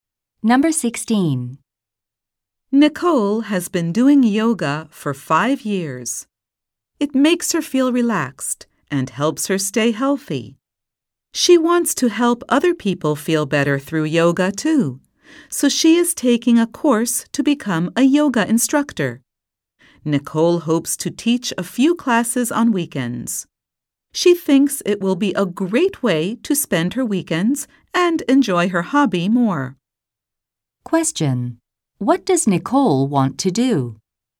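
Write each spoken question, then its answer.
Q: What does Nicole want to do?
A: Teach yoga classes on weekends (become a yoga instructor)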